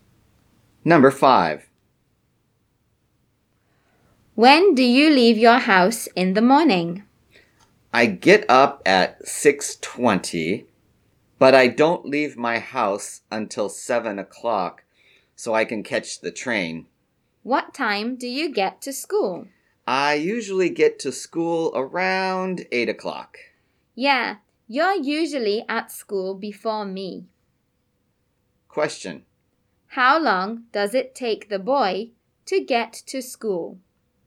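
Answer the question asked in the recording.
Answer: About one hour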